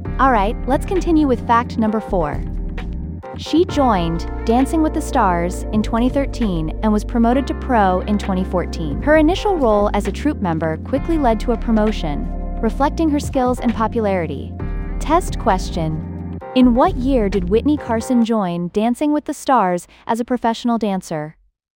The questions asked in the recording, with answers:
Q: in what year did Whitney Carson join Dancing with the Stars as a professional dancer?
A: 2014.